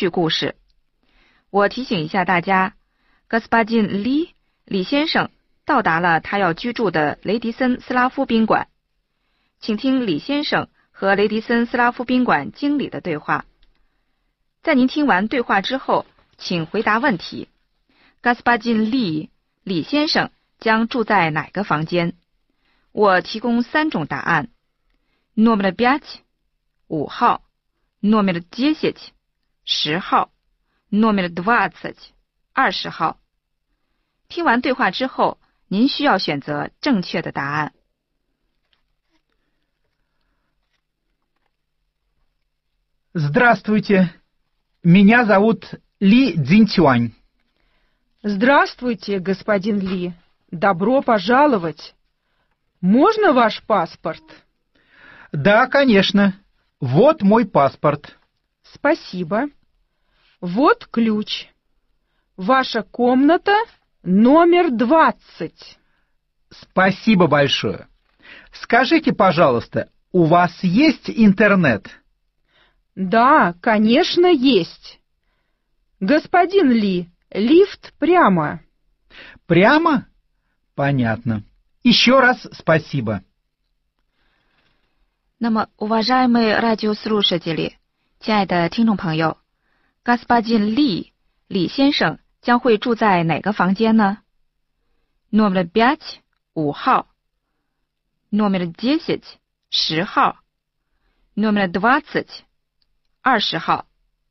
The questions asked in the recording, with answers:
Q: 李先生将住在哪个房间?我提供三种答案 номер 5,5号 номер 10,10号 номер 20,20号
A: Комната номер двадцать.